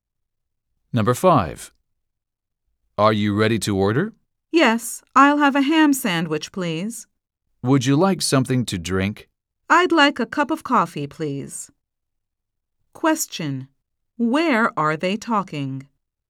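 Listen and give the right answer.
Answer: At a restaurant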